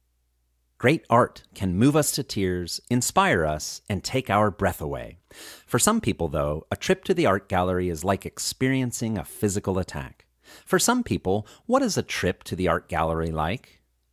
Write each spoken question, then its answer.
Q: For some people, what is a trip to the art gallery like?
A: For some people, a trip to the art gallery is like experiencing a physical attack.